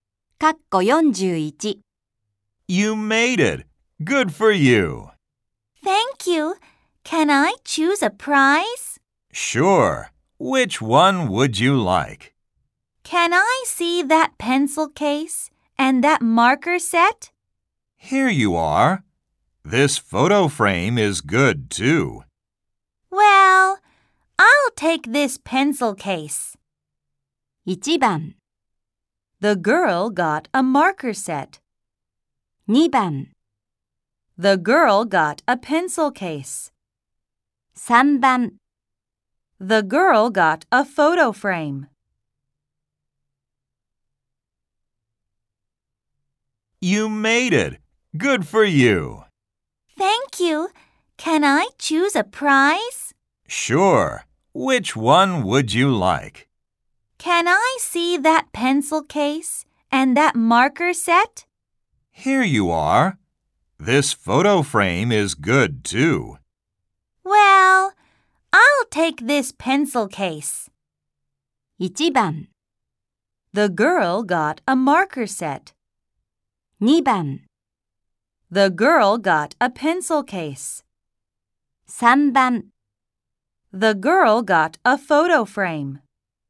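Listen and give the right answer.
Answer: 2: The girl got a pencil case.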